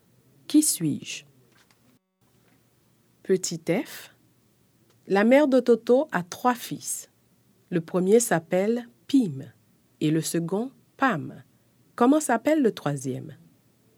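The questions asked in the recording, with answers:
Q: Comment s'appelle le troisième?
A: Toto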